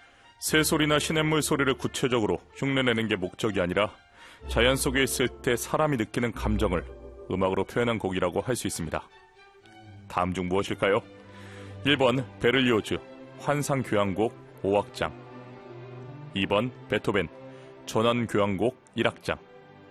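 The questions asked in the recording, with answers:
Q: 다음 중 무엇일까요? 1번 베를리오즈 환상교향곡 5악장, 2번 베토벤 전환교향곡 1악장.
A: 2: 베토벤 전원교향곡 1악장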